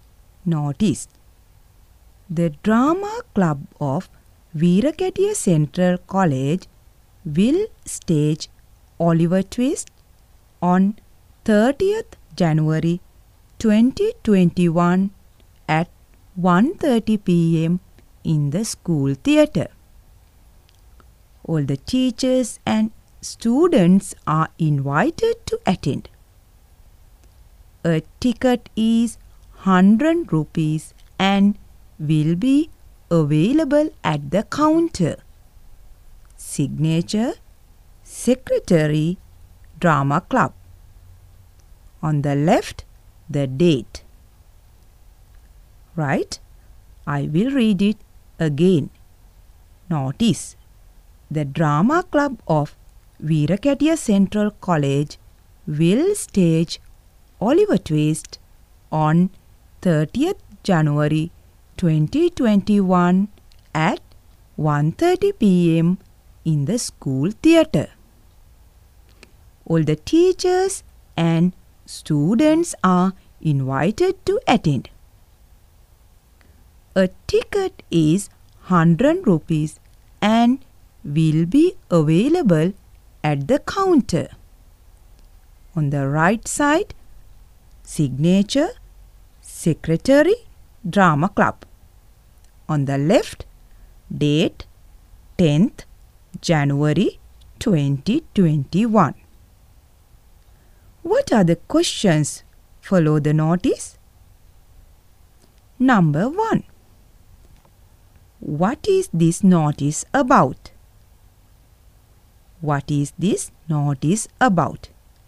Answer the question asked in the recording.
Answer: It is about a drama.